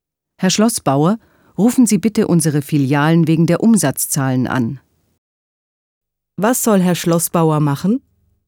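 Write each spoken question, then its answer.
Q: Was soll Herr Schlossbauer machen?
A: Die Filialen wegen der Umsatzzahlen anrufen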